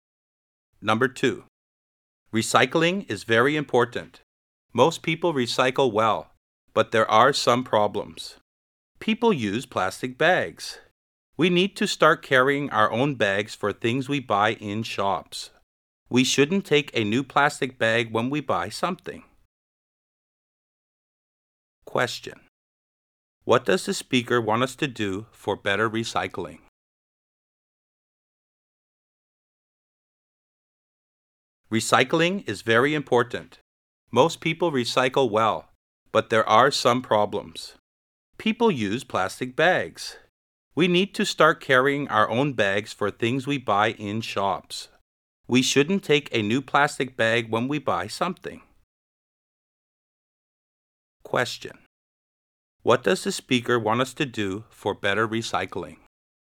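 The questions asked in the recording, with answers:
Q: Question. What does the speaker want us to do for better recycling?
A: Carry our own bags when shopping instead of taking new plastic bags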